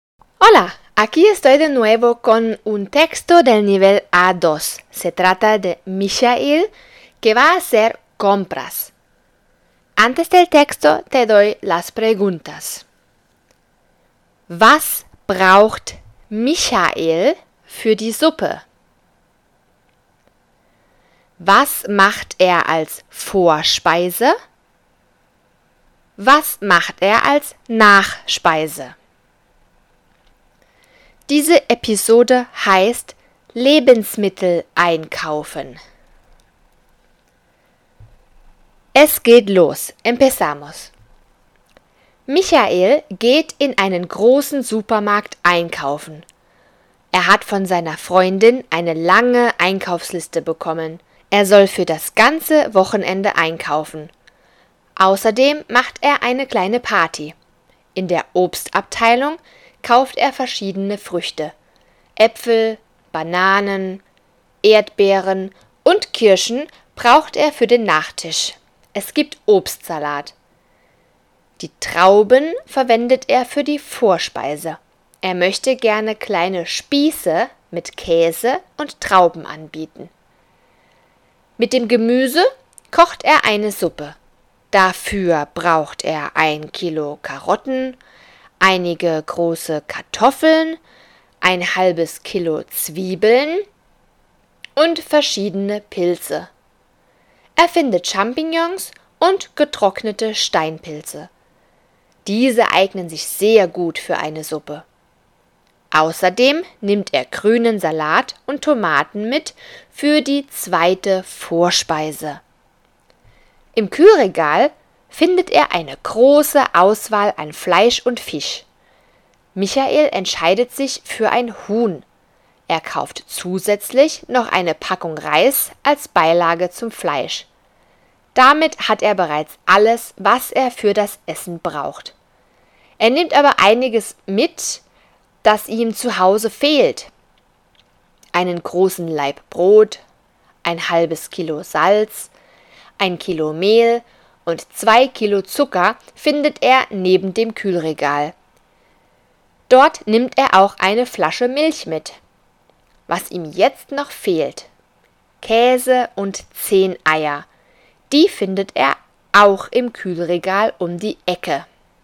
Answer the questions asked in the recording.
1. Karotten, Kartoffeln, Zwiebeln und Pilze.
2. Spieße mit Käse und Trauben und grünen Salat mit Tomaten.
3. Obstsalat.